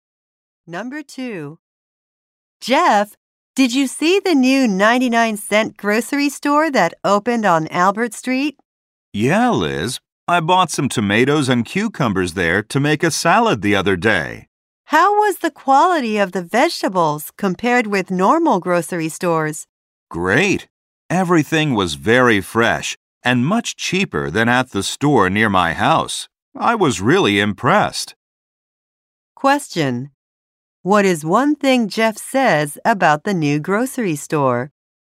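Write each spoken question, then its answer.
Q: What is one thing Jeff says about the new grocery store?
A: Its vegetables are fresh and cheap.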